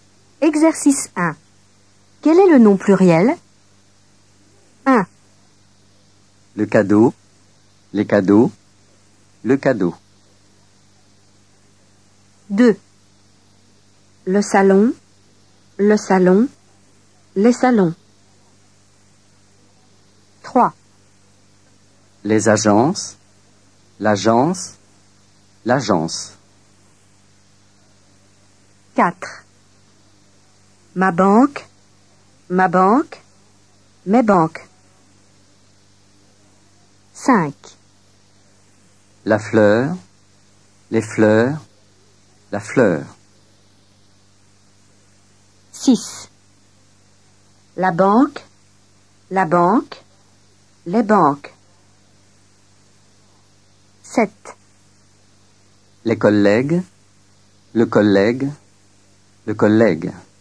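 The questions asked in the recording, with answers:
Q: Quel est le nom pluriel?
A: les cadeaux

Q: Quel est le nom pluriel?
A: les salons

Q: Quel est le nom pluriel?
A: les agences

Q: Quel est le nom pluriel?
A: mes banques

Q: Quel est le nom pluriel?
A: les fleurs

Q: Quel est le nom pluriel?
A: les banques

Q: Quel est le nom pluriel?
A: les collègues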